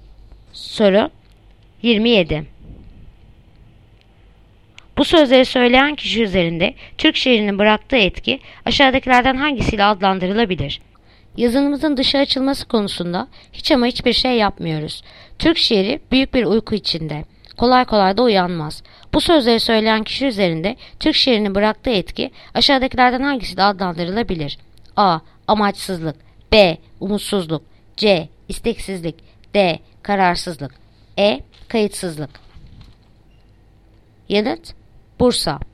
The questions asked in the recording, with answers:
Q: Bu sözleri söyleyen kişi üzerinde Türk şiirinin bıraktığı etki aşağıdakilerden hangisiyle adlandırılabilir?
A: Bursa. Umutsuzluk.